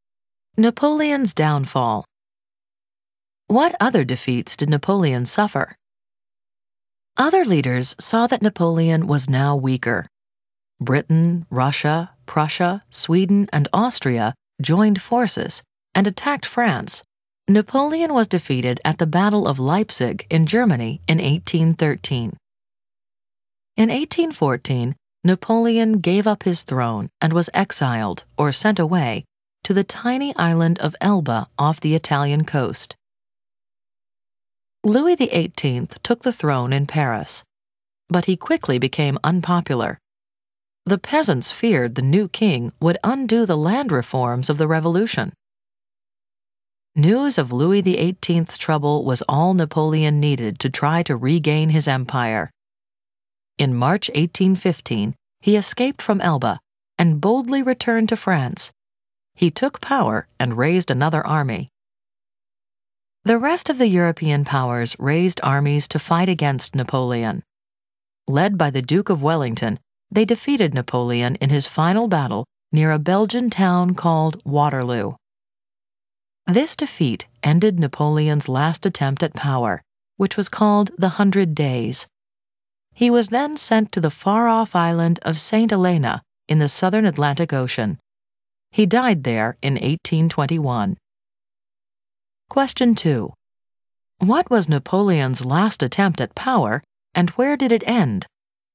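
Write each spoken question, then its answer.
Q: What was Napoleon's last attempt at power, and where did it end?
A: The Hundred Days; it ended with his defeat at Waterloo.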